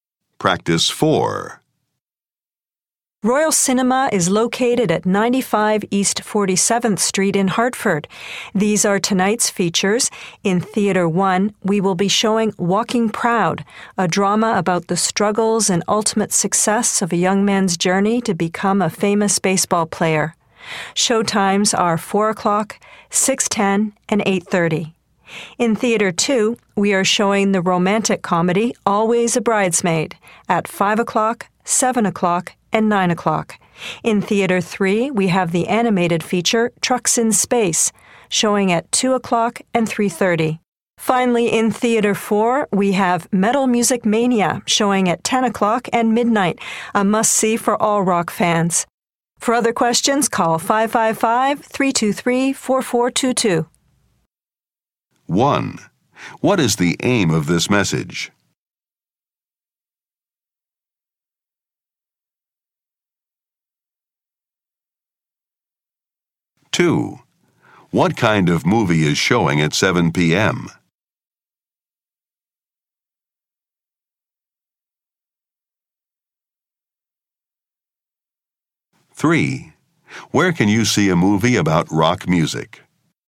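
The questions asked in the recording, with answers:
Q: What is the aim of this message?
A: To give tonight's movie showtimes at Royal Cinema

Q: What kind of movie is showing at 7 p.m.?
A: A romantic comedy

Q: Where can you see a movie about rock music?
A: In Theater 4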